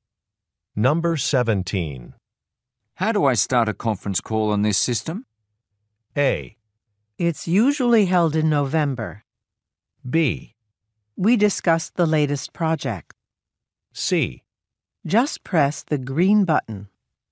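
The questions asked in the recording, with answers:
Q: How do I start a conference call on this system?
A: C: Just press the green button.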